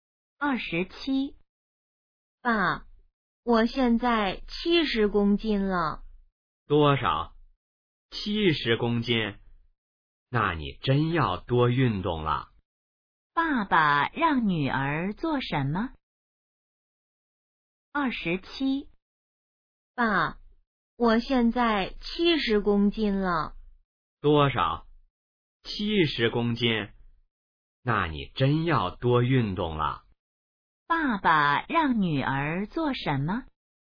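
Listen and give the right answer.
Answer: 多运动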